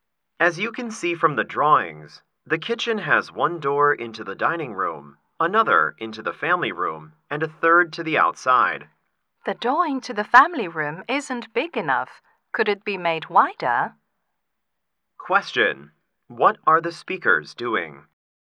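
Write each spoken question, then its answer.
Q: What are the speakers doing?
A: Discussing plans for a kitchen (house design drawings)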